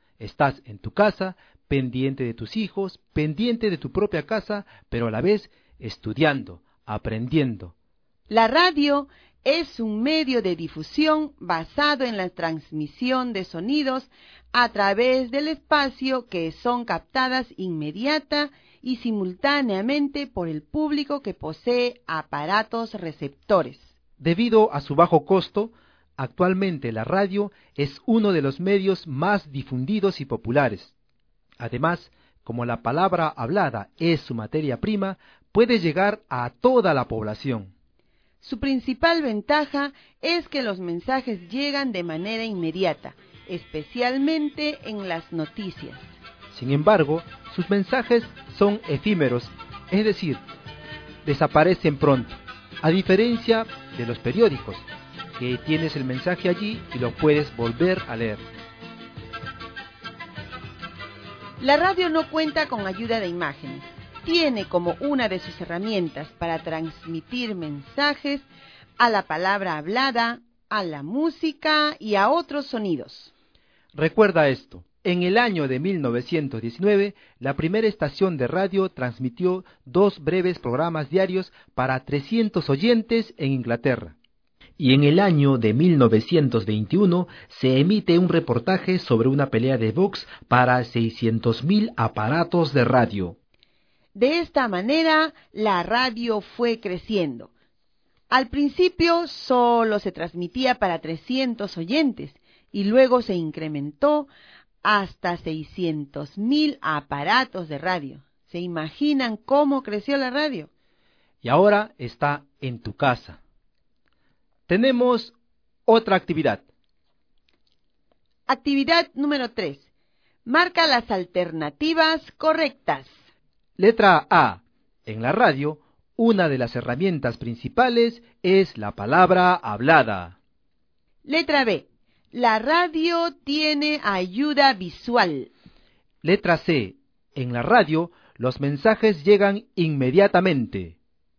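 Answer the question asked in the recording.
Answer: A: En la radio, una de las herramientas principales es la palabra hablada. C: En la radio, los mensajes llegan inmediatamente.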